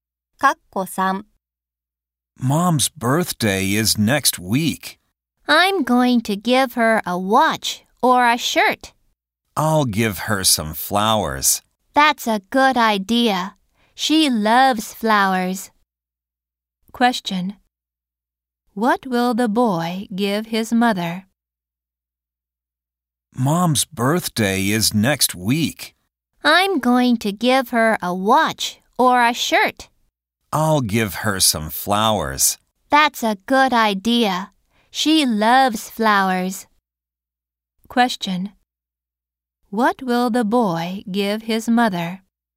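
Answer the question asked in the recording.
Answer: Some flowers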